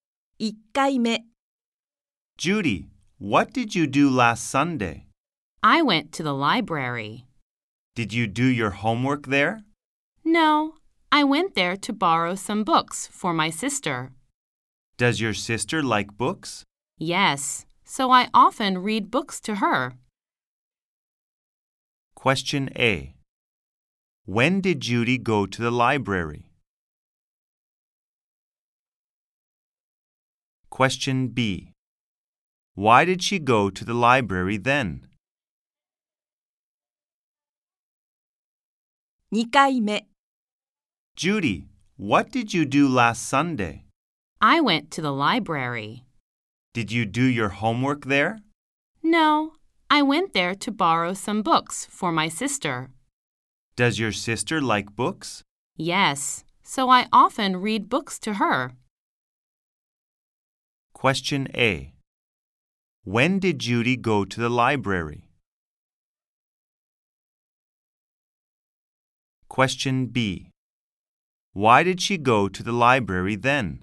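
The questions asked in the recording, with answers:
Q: Question A. When did Judy go to the library?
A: Last Sunday.

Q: Question B. Why did she go to the library then?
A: To borrow some books for her sister.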